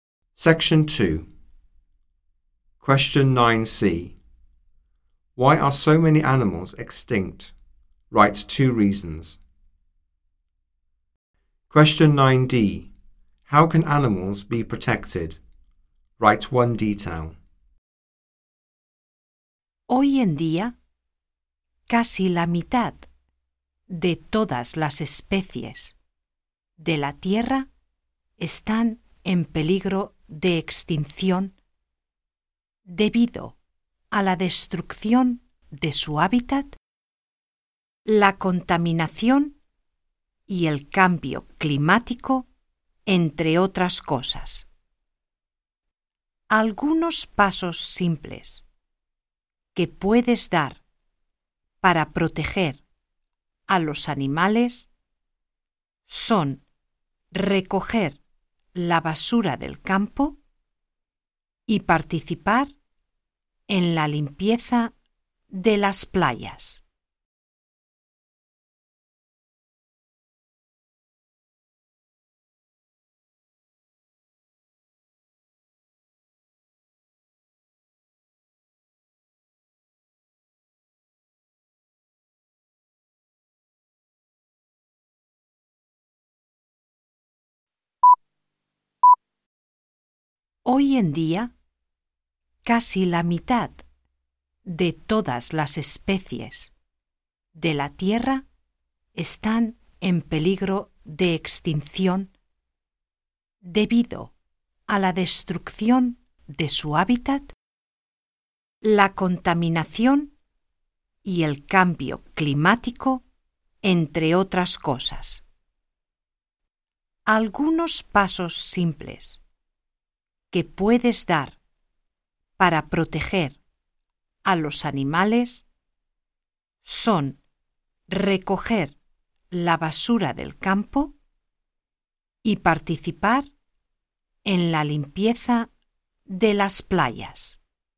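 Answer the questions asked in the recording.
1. Habitat destruction, pollution, climate change
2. Pick up litter in the countryside; help clean beaches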